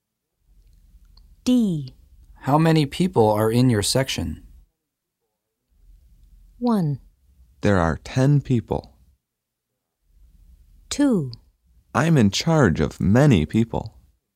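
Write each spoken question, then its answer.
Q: How many people are in your section?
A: 1: There are 10 people.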